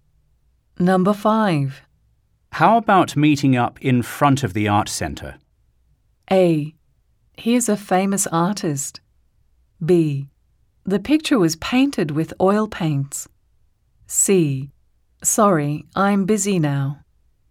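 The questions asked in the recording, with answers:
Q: How about meeting up in front of the art center?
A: C: Sorry, I'm busy now.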